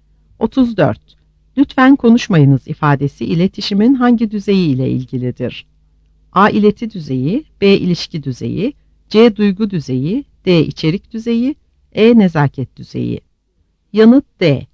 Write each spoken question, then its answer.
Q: Lütfen konuşmayınız ifadesi iletişimin hangi düzeyi ile ilgilidir?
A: Yanıt D.